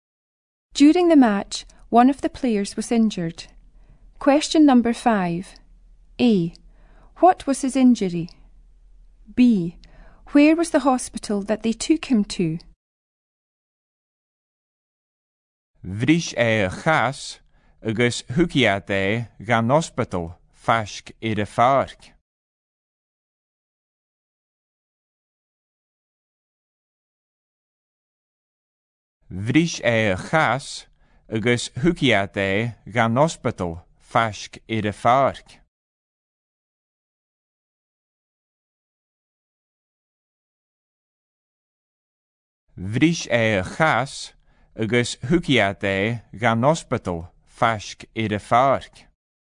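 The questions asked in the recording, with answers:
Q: What was his injury?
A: He broke his leg

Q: Where was the hospital that they took him to?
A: Near the park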